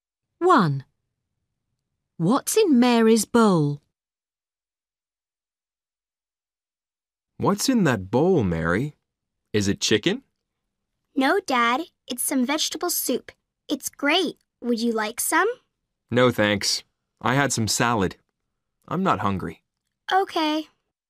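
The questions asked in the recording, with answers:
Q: What's in Mary's bowl?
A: vegetable soup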